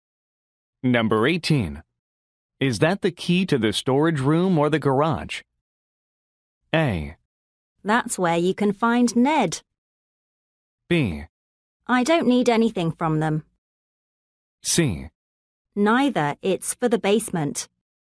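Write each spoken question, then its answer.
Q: Is that the key to the storage room or the garage?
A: C: Neither, it's for the basement.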